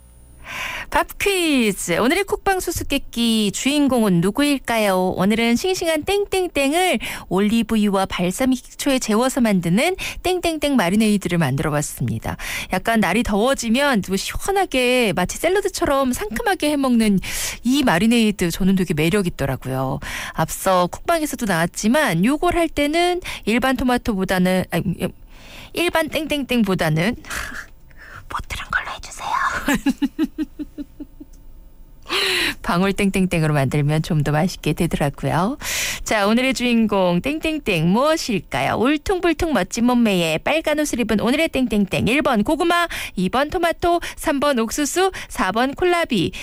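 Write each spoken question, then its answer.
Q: 자, 오늘의 주인공 땡땡땡 무엇일까요?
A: 2번: 토마토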